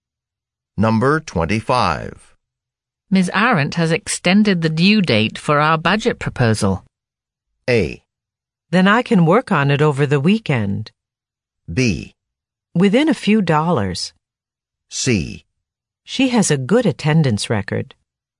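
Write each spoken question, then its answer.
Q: Ms. Arendt has extended the due date for our budget proposal.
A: A: Then I can work on it over the weekend.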